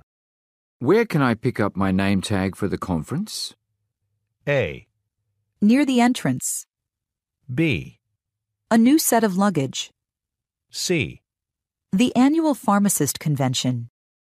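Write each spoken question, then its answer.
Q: Where can I pick up my name tag for the conference?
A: A: Near the entrance.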